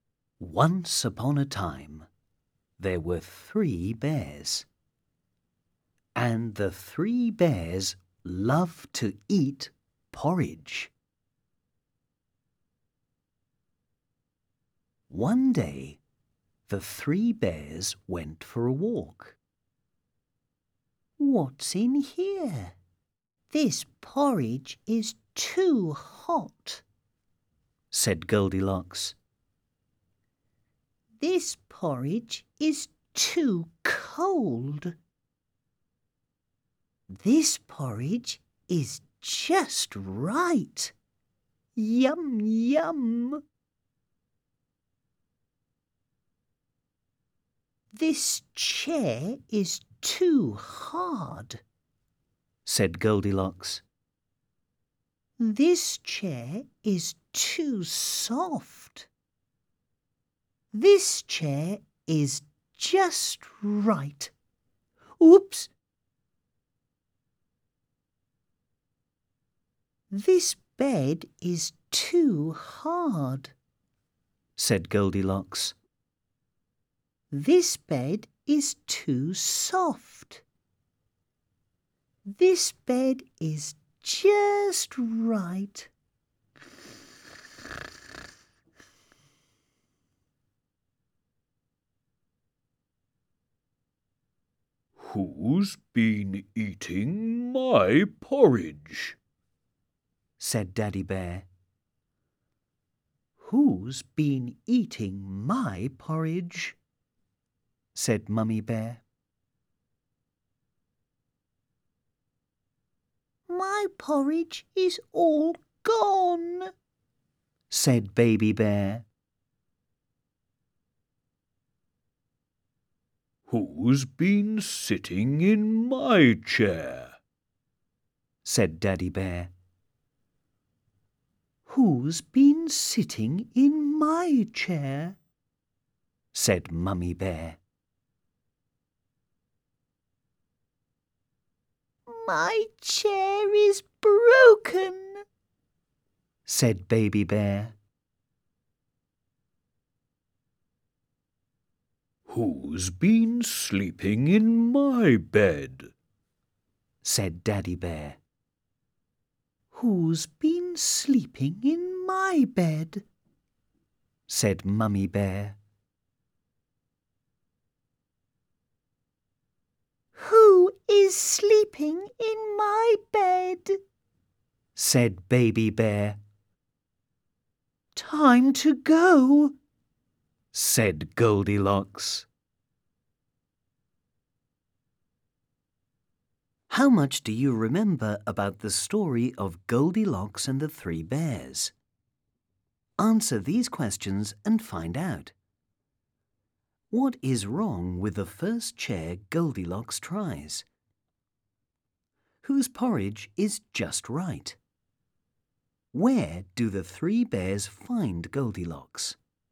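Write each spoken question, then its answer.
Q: What is wrong with the first chair Goldilocks tries?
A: It is too hard.

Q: Whose porridge is just right?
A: Baby Bear's

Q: Where do the three bears find Goldilocks?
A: In Baby Bear's bed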